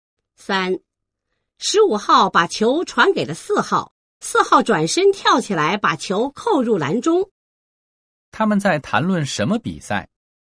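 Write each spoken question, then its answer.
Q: 他们在谈论什么比赛?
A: 篮球比赛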